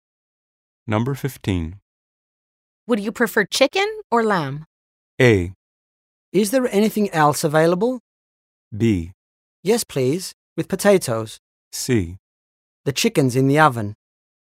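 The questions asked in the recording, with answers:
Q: Would you prefer chicken or lamb?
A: A: Is there anything else available?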